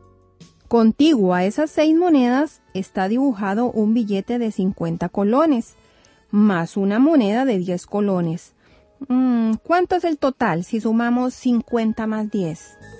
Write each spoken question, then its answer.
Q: ¿Cuánto es el total si sumamos 50 más 10?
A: ¡60 colones! Esa es la respuesta de sumar 50 más 10.